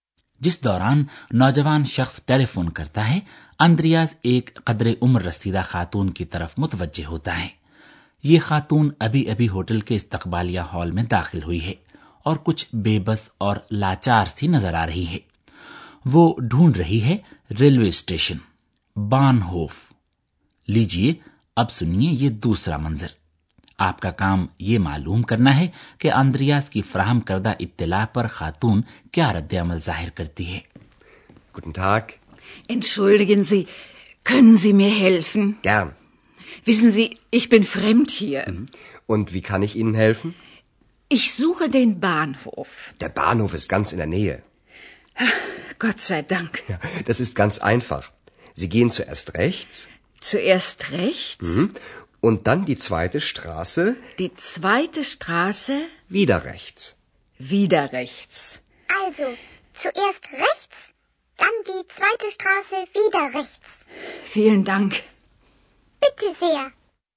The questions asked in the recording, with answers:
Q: آپ کا کام یہ معلوم کرنا ہے کہ اندریاز کی فراہم کردہ اطلاع پر خاتون کیا رد عمل ظاہر کرتی ہے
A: اطمینان کا سانس لیتی ہے اس کے منہ سے نکلتا ہے شکر ہے خدا کا